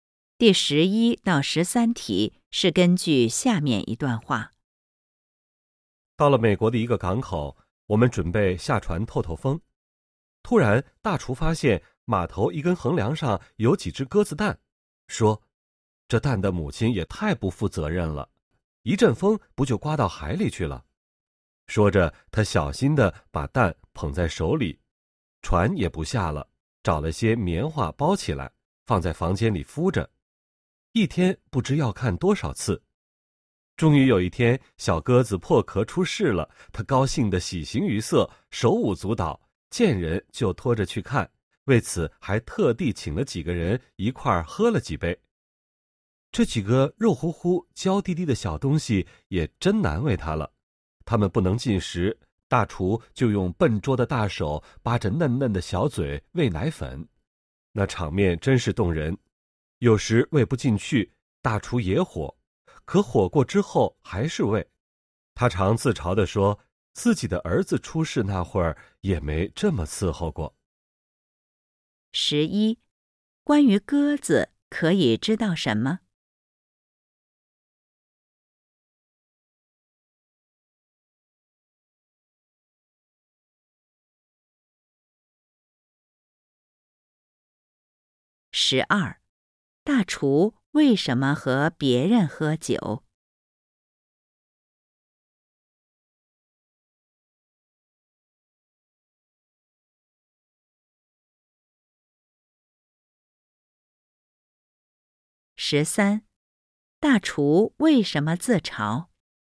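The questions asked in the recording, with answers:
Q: 大厨为什么和别人喝酒?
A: 因为小鸽子破壳出世了,他很高兴

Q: 大厨为什么自嘲?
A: 他照顾小鸽子比照顾自己刚出世的儿子还用心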